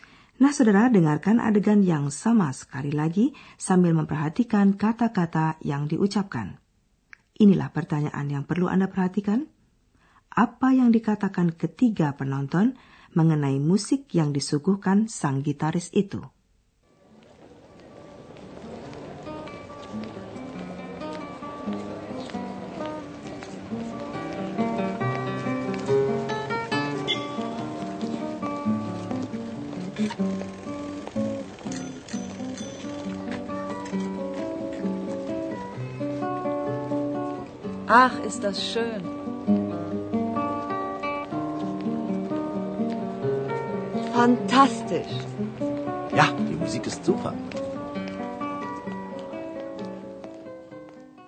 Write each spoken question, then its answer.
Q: Apa yang dikatakan ketiga penonton mengenai musik yang disuguhkan sang gitaris itu?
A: Ketiga penonton menyukai musik itu.